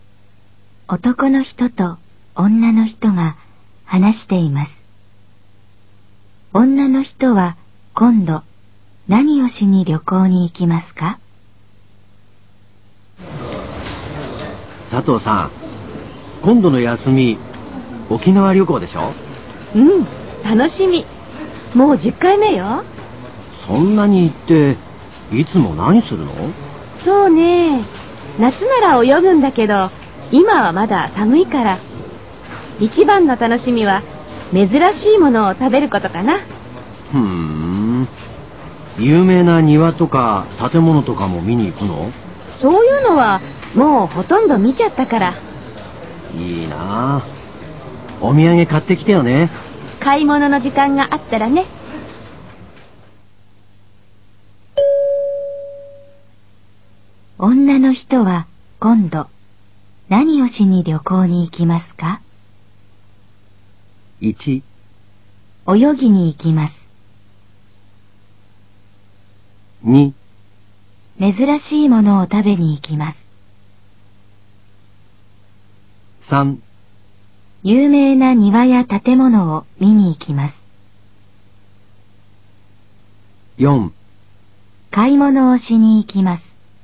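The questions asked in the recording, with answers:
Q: 女の人は今度何をしに旅行に行きますか?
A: 2: 珍しいものを食べに行きます。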